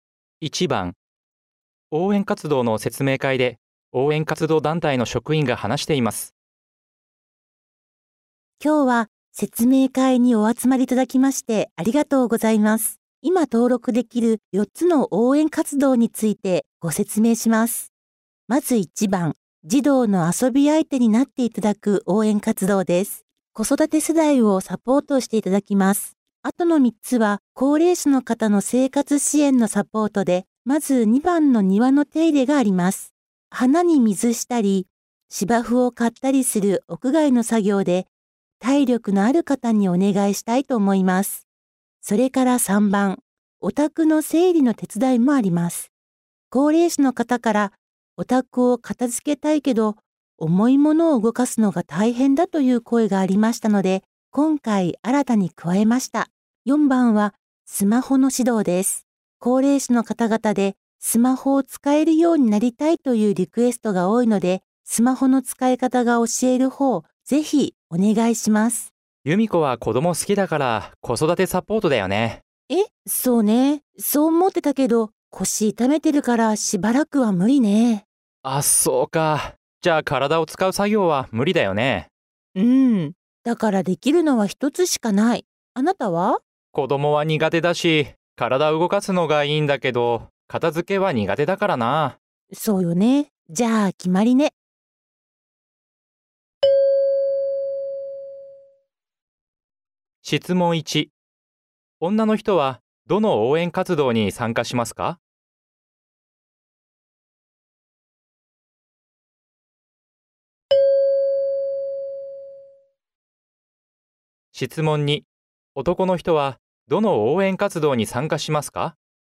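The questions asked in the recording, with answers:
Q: 女の人はどの応援活動に参加しますか?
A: 4番: スマホの指導

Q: 男の人はどの応援活動に参加しますか?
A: 2番: 庭の手入れ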